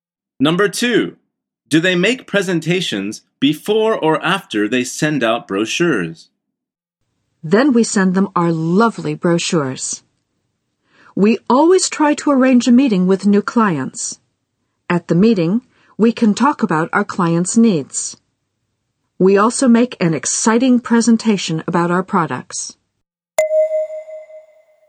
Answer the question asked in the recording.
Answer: The answer is after they send out brochures.